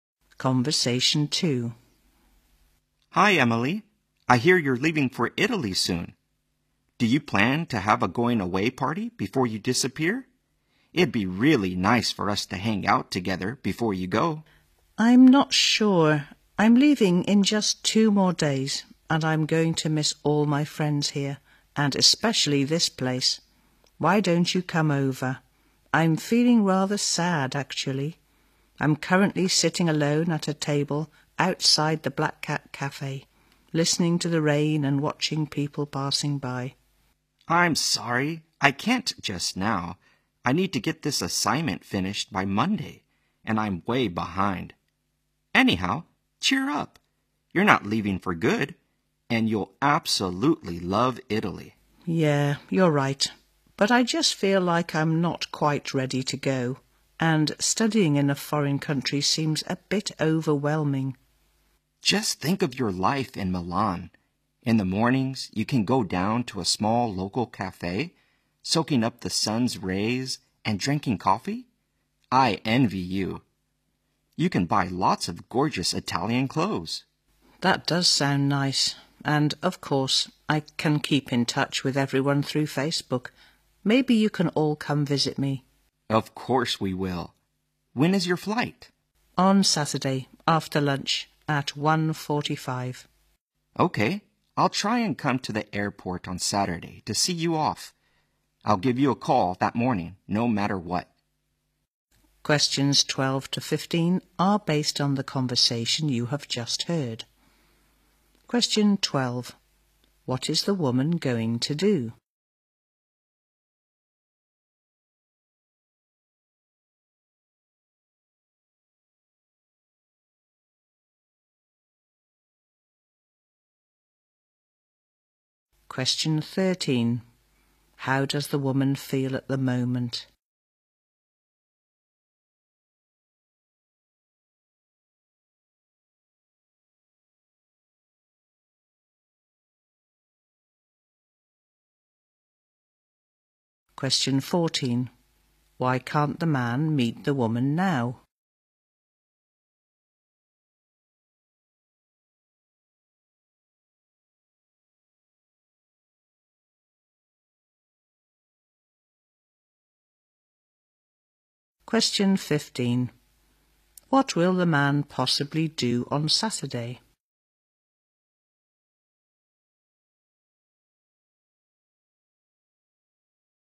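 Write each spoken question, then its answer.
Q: What is the woman going to do?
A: Go to study in Italy

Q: How does the woman feel at the moment?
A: Rather sad

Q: Why can't the man meet the woman now?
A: He must finish an assignment by Monday

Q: What will the man possibly do on Saturday?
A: See her off at the airport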